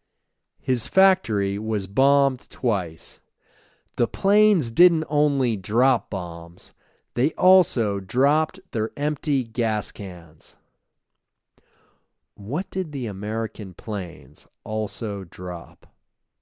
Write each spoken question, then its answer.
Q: What did the American planes also drop?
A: They also dropped their empty gas cans.